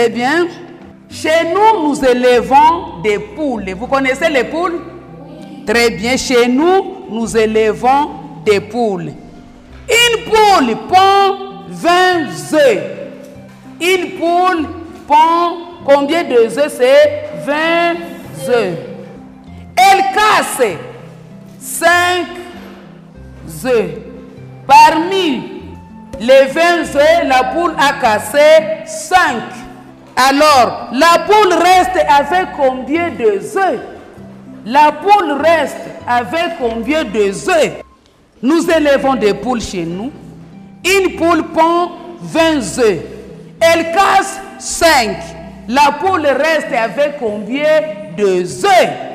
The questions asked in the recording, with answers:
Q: La poule reste avec combien de œufs?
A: La réponse, c'est 15.